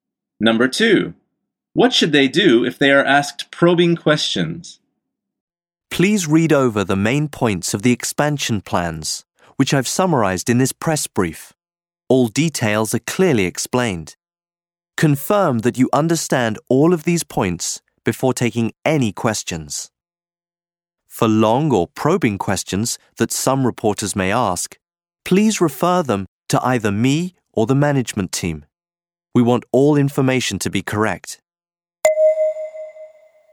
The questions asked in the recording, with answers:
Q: what should they do if they are asked probing questions?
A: The answer is, refer them to the speaker or the management team.